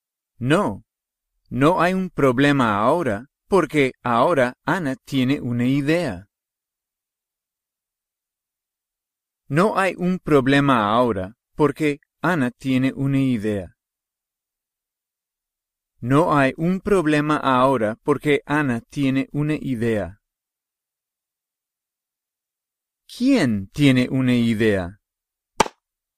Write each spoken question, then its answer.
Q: ¿Quién tiene una idea?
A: Ana.